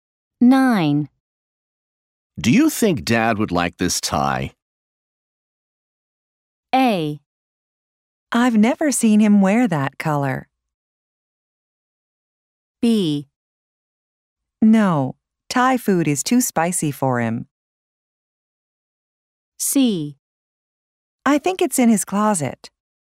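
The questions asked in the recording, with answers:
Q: Do you think Dad would like this tie?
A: A: I've never seen him wear that color.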